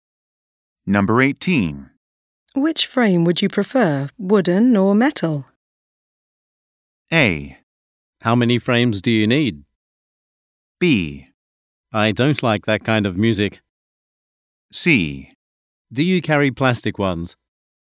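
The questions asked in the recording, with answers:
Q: Which frame would you prefer, wooden or metal?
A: C: Do you carry plastic ones?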